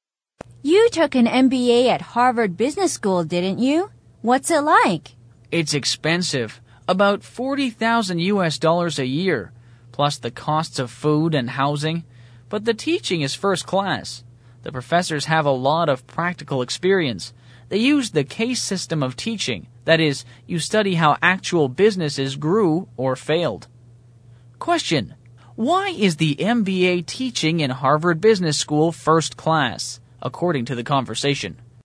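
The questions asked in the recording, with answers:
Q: why is the MBA teaching in Harvard Business School first class, according to the conversation?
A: The professors have a lot of practical experience and use the case system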